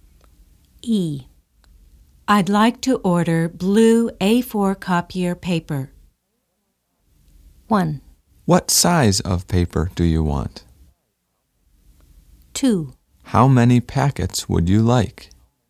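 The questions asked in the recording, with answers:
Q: I'd like to order blue A4 copier paper.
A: 2: How many packets would you like?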